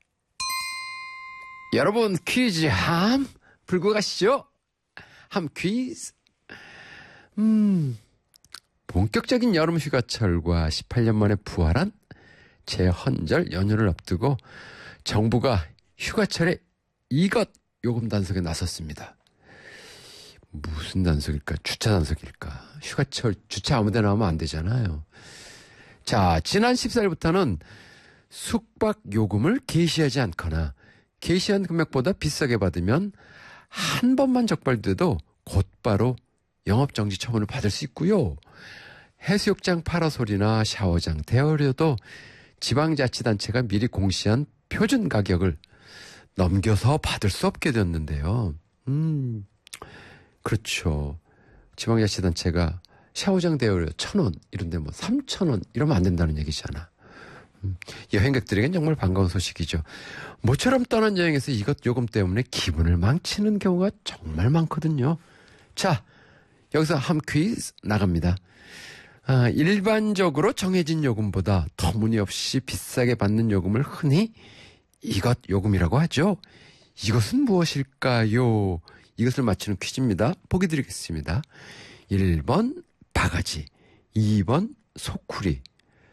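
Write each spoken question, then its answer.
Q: 이것은 무엇일까요?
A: 1: 바가지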